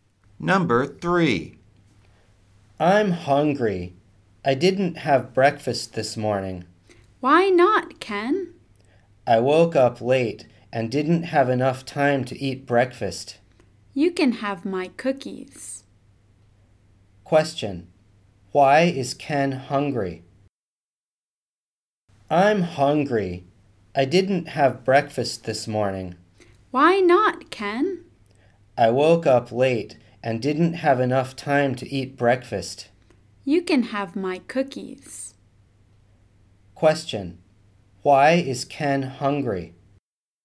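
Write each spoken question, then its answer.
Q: Why is Ken hungry?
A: He woke up late and didn't have time to eat breakfast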